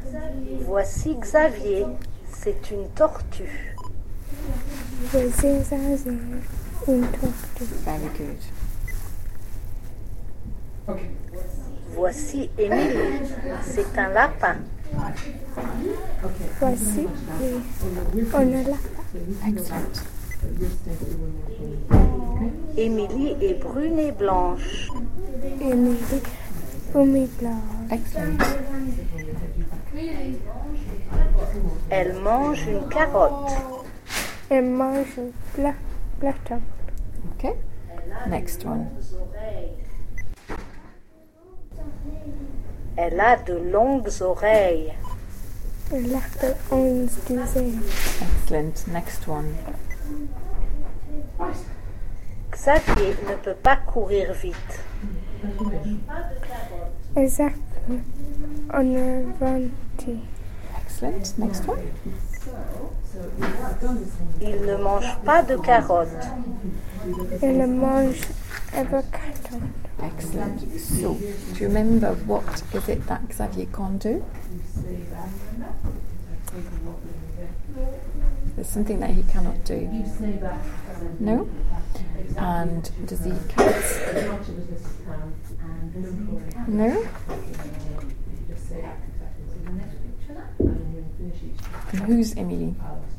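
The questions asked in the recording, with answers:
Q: So, do you remember what is it that Xavier can't do?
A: He can't run fast

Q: And does he eat carrots?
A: No

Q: And who's Emily?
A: A rabbit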